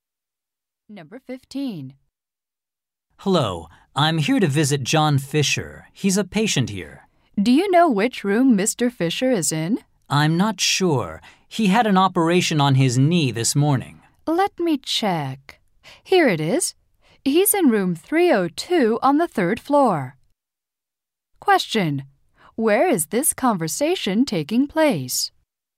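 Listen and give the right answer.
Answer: At a hospital.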